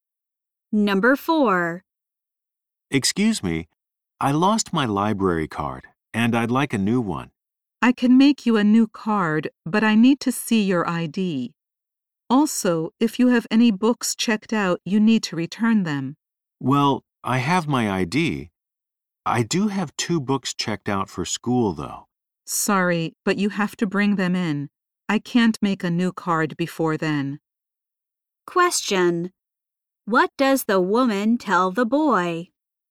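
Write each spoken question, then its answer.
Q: What does the woman tell the boy?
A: He must return his checked-out books before she can make a new card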